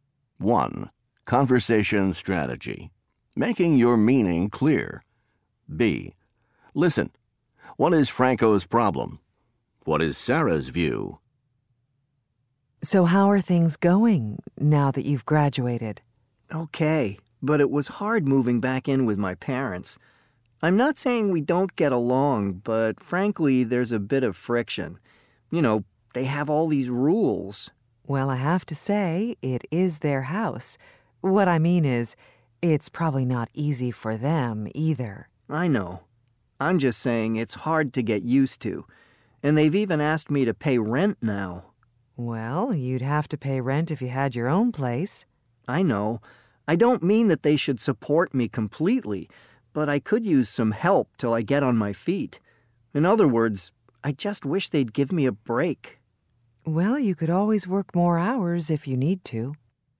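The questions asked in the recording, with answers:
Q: What is Franco's problem?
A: Living with his parents after graduating is hard: there's friction over their rules, and they want him to pay rent.

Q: What is Sarah's view?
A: It's their house, and it's probably not easy for them either; he'd have to pay rent anyway and could work more hours.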